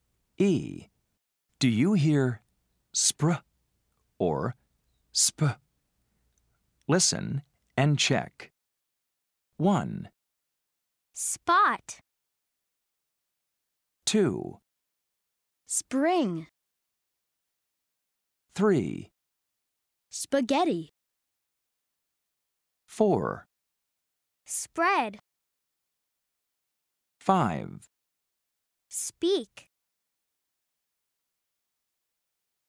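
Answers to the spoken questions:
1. sp (spot)
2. spr (spring)
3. sp (spaghetti)
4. spr (spread)
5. sp (speak)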